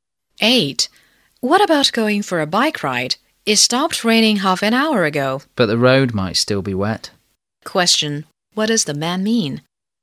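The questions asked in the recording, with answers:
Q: What does the man mean?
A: It may not be a good time for a bike ride, because the road might still be wet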